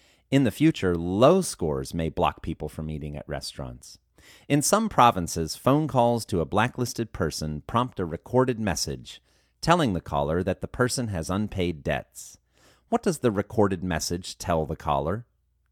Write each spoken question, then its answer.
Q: What does the recorded message tell the caller?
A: The recorded message tells the caller that the person has unpaid debts.